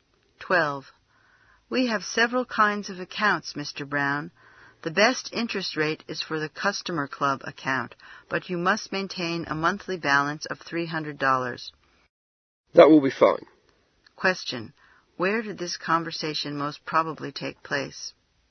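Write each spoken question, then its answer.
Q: Where did this conversation most probably take place?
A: At a bank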